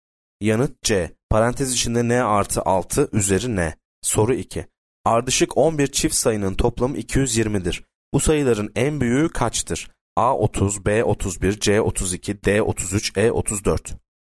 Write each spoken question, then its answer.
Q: Bu sayıların en büyüğü kaçtır?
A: Yanıt A 30.